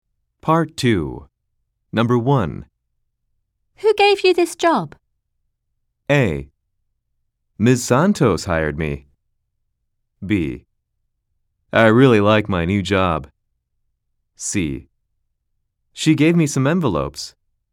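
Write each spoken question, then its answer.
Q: Who gave you this job?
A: A: Ms. Santos hired me.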